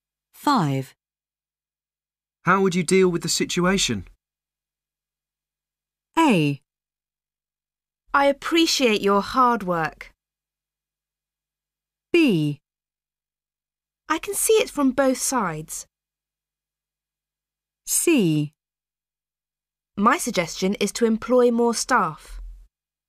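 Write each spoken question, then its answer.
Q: How would you deal with the situation?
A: C: My suggestion is to employ more staff.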